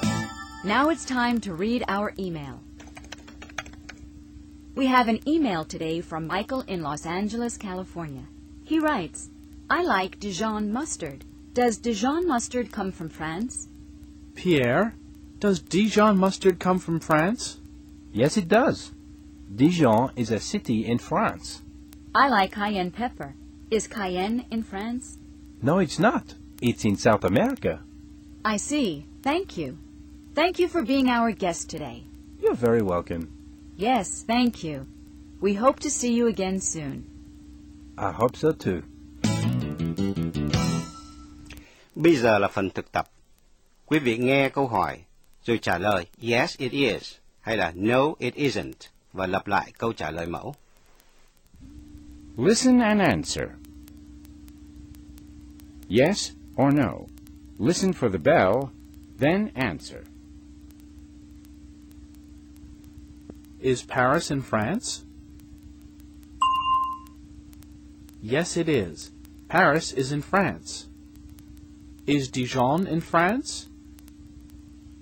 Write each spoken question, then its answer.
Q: Is Dijon in France?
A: Yes, it is. Dijon is in France.